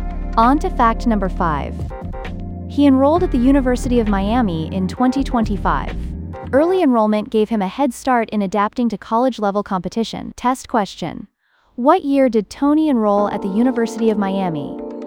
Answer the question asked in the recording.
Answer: Correct answer, 2025.